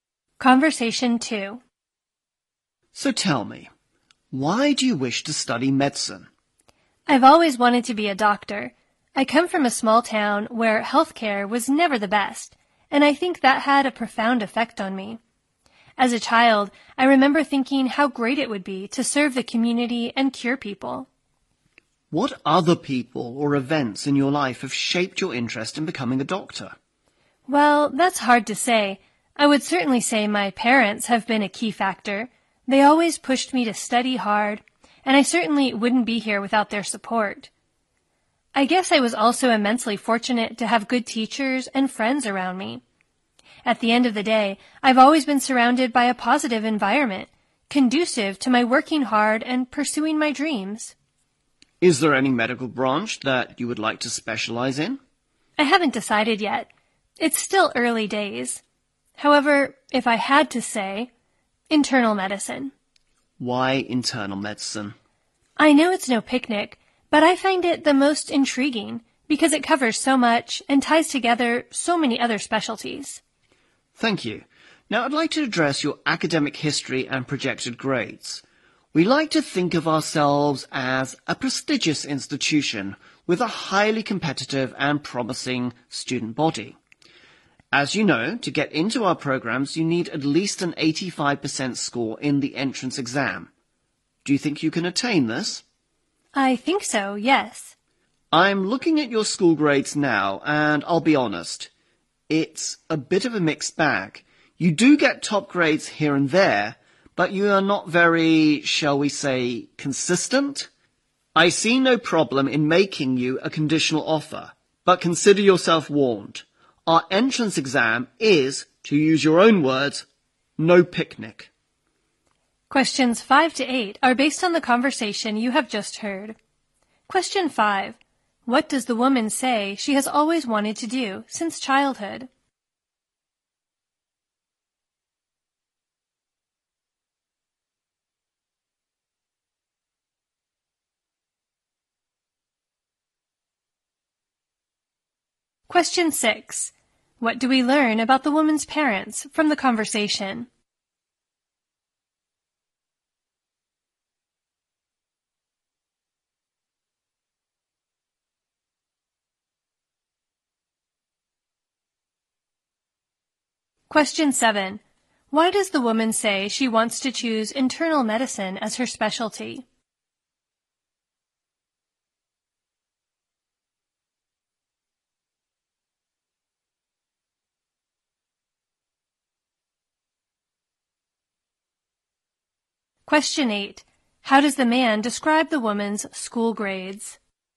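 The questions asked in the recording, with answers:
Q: What does the woman say she has always wanted to do since childhood?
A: Be a doctor, serving the community and curing people

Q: What do we learn about the woman's parents from the conversation?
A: They always pushed her to study hard and supported her

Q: Why does the woman say she wants to choose internal medicine as her specialty?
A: It is the most intriguing because it covers so much and ties together many specialties

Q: How does the man describe the woman's school grades?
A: A mixed bag: some top grades but not consistent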